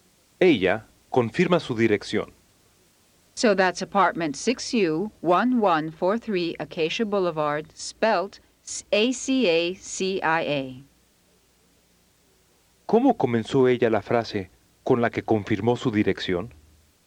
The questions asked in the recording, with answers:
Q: ¿Cómo comenzó ella la frase con la que confirmó su dirección?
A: So that's.